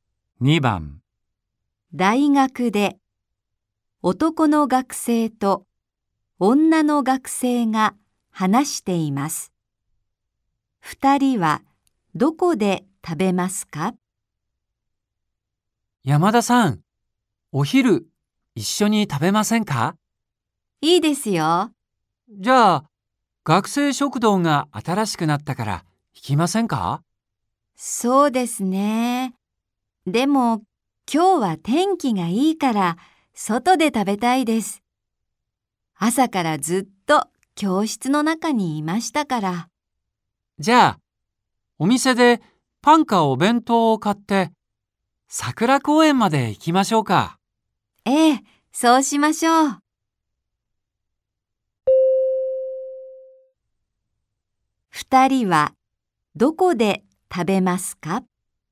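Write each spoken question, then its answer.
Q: 2人はどこで食べますか?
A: 桜公園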